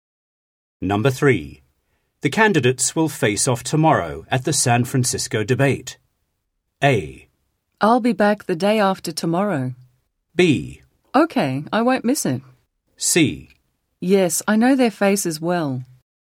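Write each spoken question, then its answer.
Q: The candidates will face off tomorrow at the San Francisco debate.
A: B: Okay, I won't miss it.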